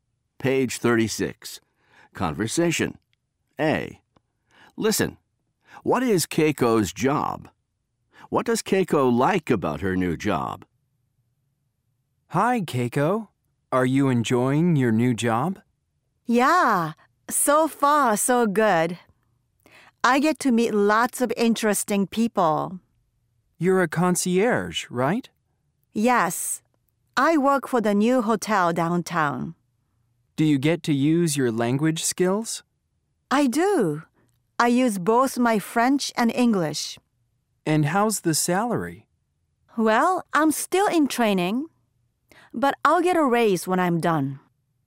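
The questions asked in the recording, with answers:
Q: What is Keiko's job?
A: She is a concierge at the new hotel downtown.

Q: What does Keiko like about her new job?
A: She gets to meet lots of interesting people.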